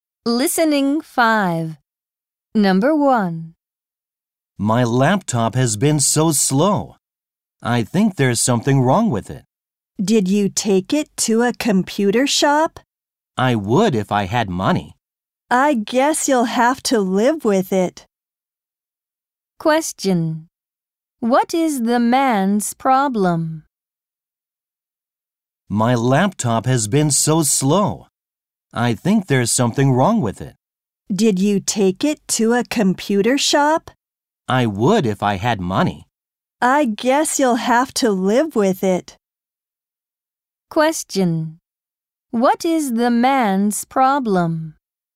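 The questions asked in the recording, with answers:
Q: What is the man's problem?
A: His laptop is slow and he has no money to get it fixed.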